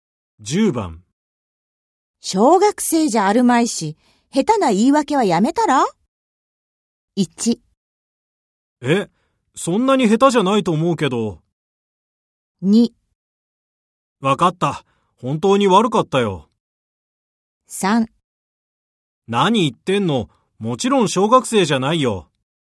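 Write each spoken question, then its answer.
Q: 小学生じゃあるまいし、下手な言い訳はやめたら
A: 2: わかった、本当に悪かったよ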